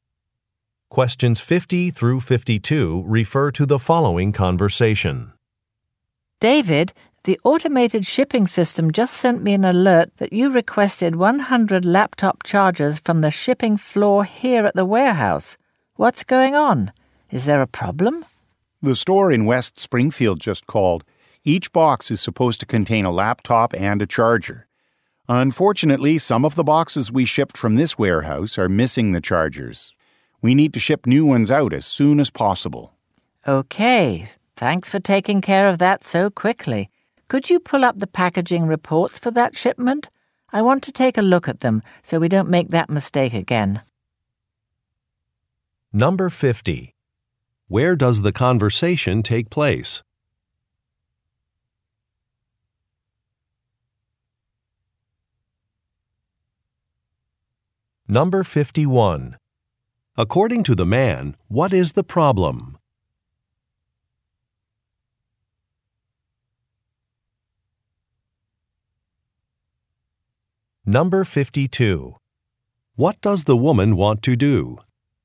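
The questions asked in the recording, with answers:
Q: Where does the conversation take place?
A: At a warehouse

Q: According to the man, what is the problem?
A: Some shipped boxes are missing chargers

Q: What does the woman want to do?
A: Review the packaging reports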